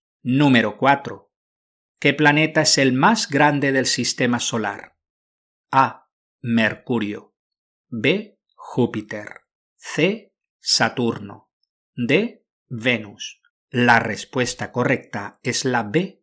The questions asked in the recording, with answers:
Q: ¿Qué planeta es el más grande del sistema solar?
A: La respuesta correcta es la B. Júpiter.